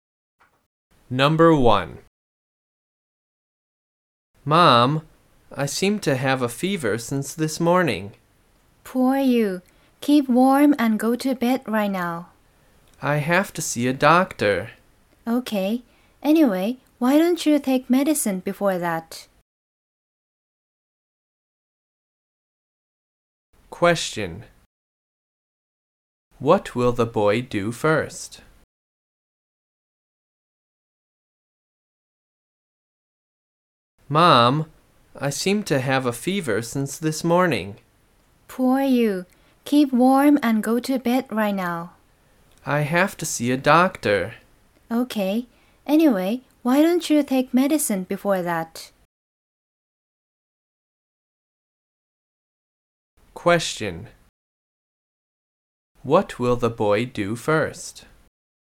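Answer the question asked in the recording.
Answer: Take medicine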